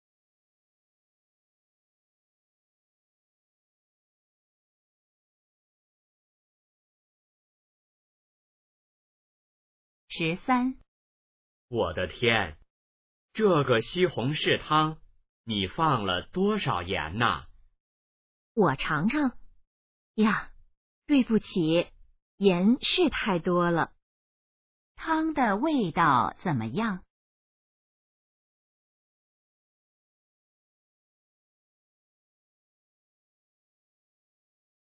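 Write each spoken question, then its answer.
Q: 汤的味道怎么样?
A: 太咸了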